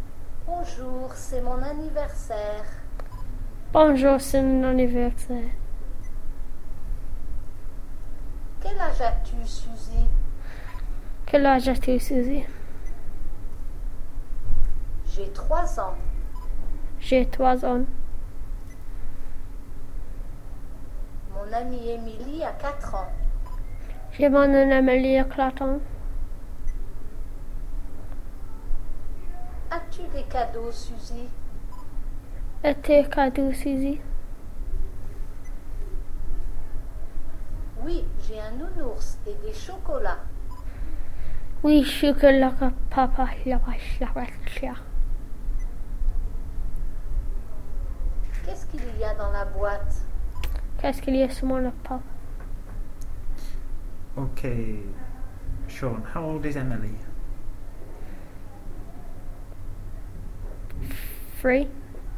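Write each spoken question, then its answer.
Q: Ok, Sean, how old is Emily?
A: Four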